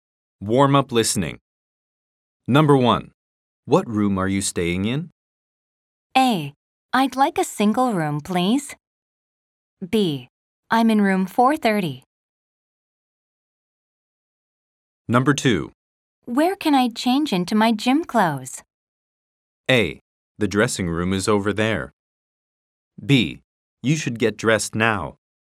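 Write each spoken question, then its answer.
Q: What room are you staying in?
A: B: I'm in room 430.

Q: Where can I change into my gym clothes?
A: A: The dressing room is over there.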